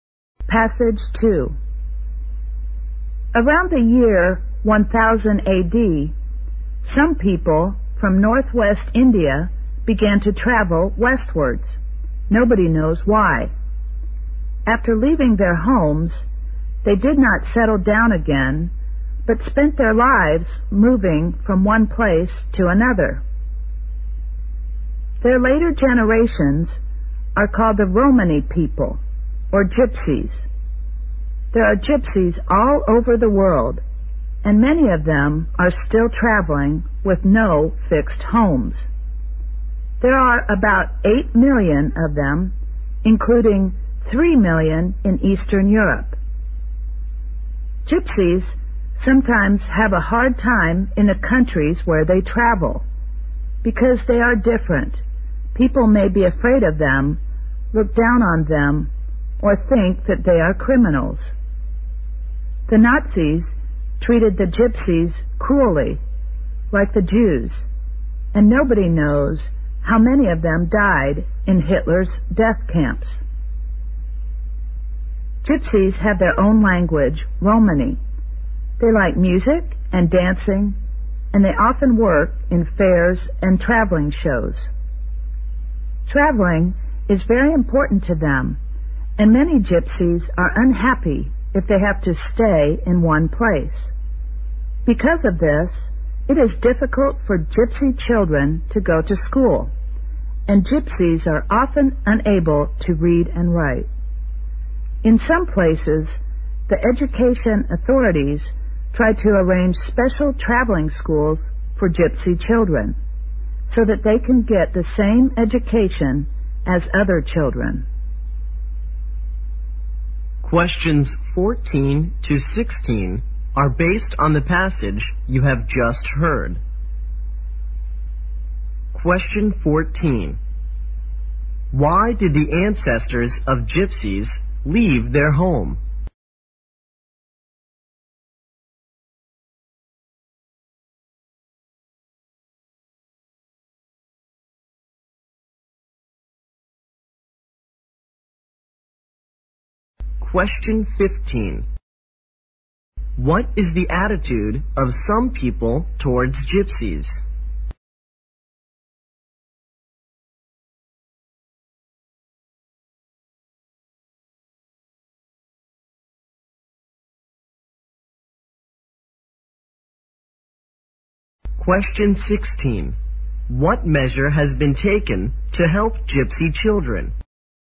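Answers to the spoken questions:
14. Nobody knows why
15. They are afraid of them, look down on them, or think they are criminals
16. Special traveling schools have been arranged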